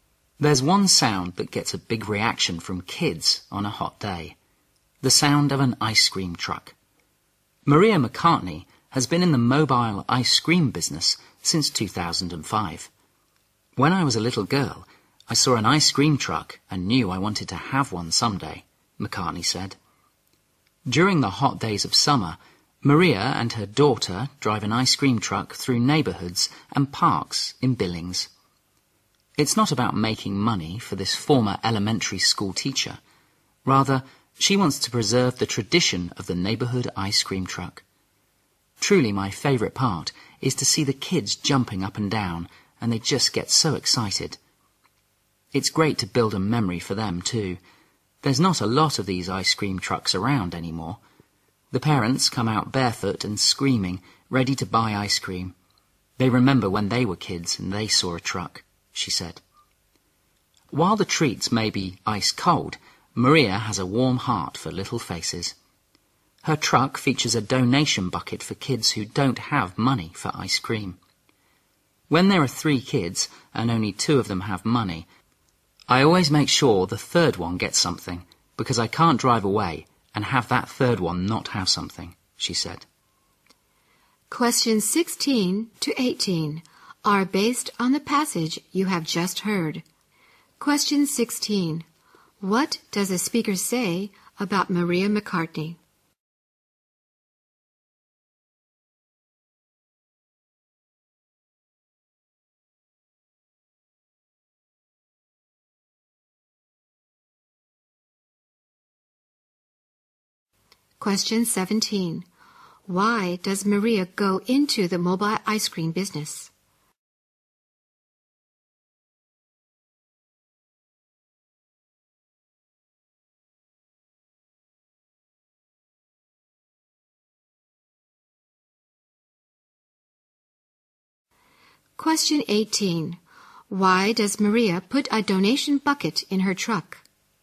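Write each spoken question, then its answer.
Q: What does a speaker say about Maria McCartney?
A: She is a former elementary school teacher who has run an ice cream truck since 2005

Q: Why does Maria go into the mobile ice cream business?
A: To preserve the tradition of the neighborhood ice cream truck

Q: Why does Maria put a donation bucket in her truck?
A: So kids without money can still get ice cream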